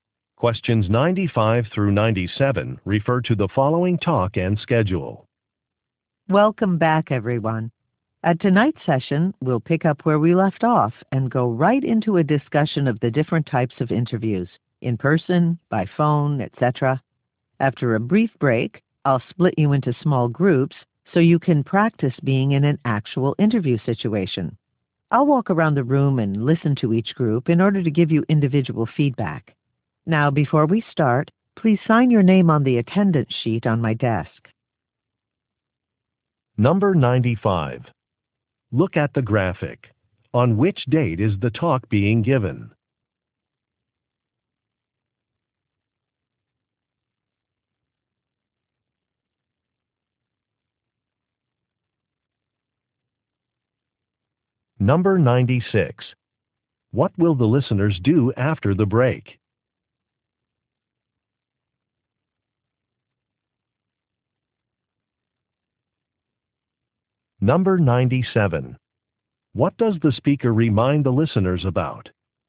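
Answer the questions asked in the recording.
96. Practice interviews in small groups
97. To sign the attendance sheet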